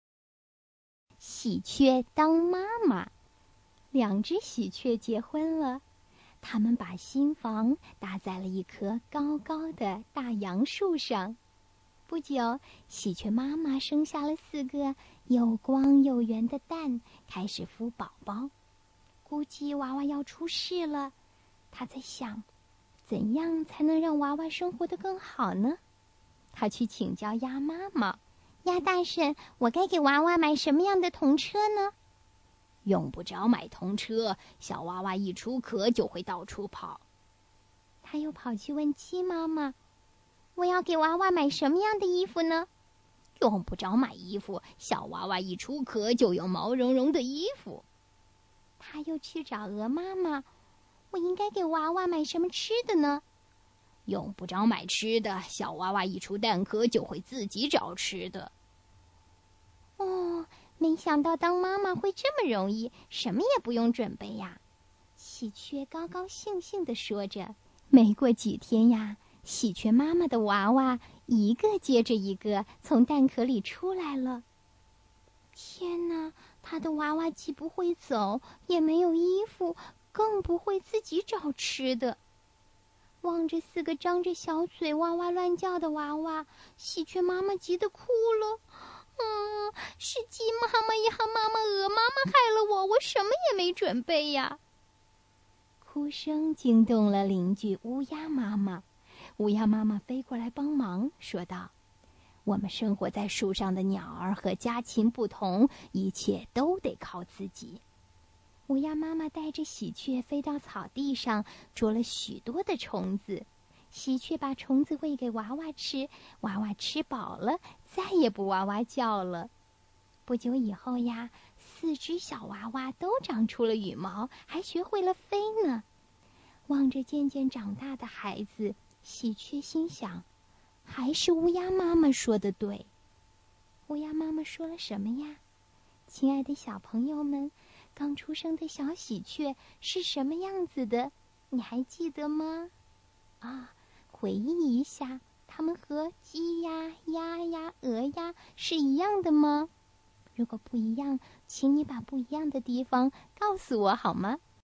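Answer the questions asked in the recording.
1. 我们生活在树上的鸟儿和家禽不同,一切都得靠自己。
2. 不会走,没有衣服(羽毛),不会自己找吃的,张着小嘴哇哇乱叫
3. 不一样:小鸡、小鸭、小鹅一出壳就会跑、有毛茸茸的衣服、会自己找吃的;小喜鹊都不会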